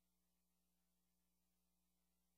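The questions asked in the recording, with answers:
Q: What does the man imply?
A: He can't help with the homework tonight.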